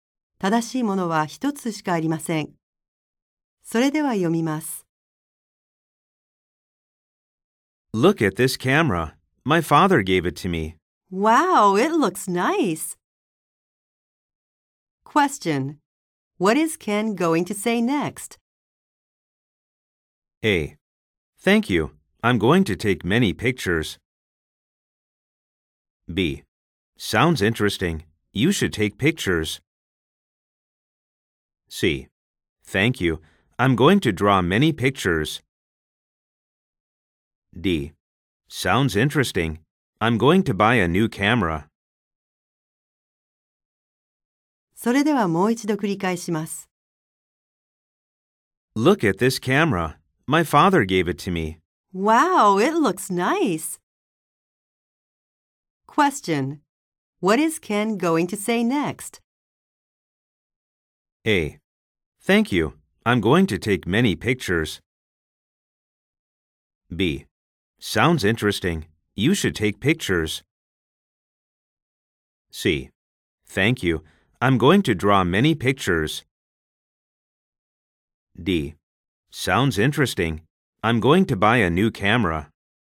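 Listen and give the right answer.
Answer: A: Thank you. I'm going to take many pictures.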